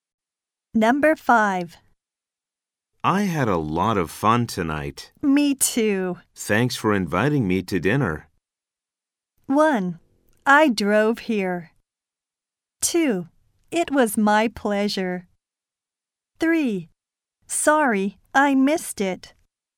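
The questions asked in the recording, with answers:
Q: Thanks for inviting me to dinner.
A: 2: It was my pleasure.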